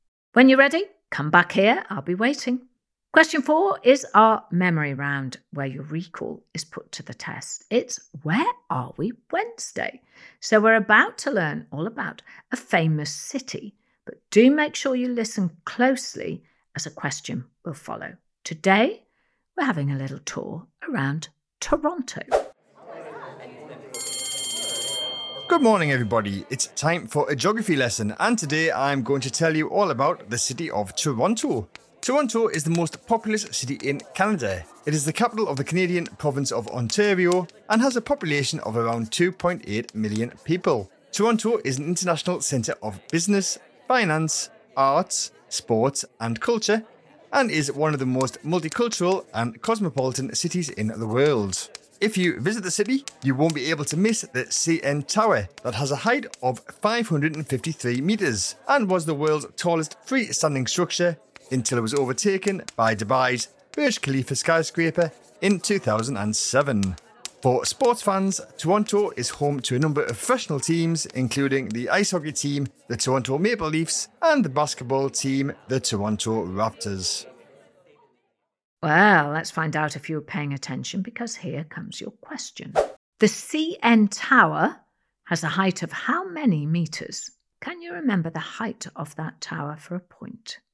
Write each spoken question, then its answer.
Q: The CN Tower has a height of how many metres?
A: The answer was 553 metres.